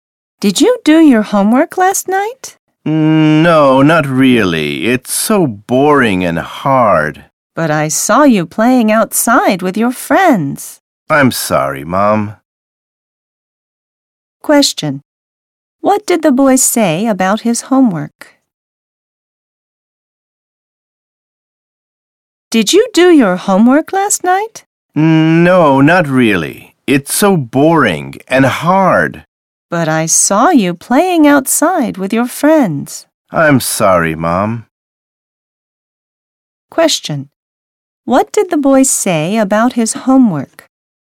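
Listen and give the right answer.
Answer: It is boring and hard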